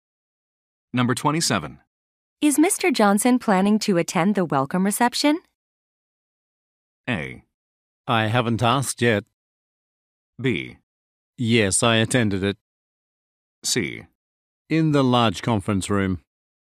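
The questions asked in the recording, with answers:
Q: Is Mr. Johnson planning to attend the welcome reception?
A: A: I haven't asked yet.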